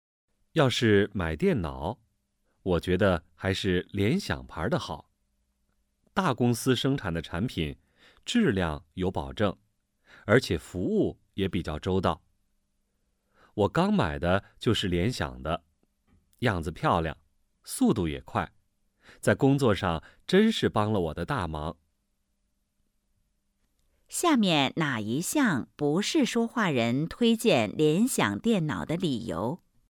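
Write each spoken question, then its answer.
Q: 说话人的电脑怎么样?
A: 是联想的,样子漂亮,速度也快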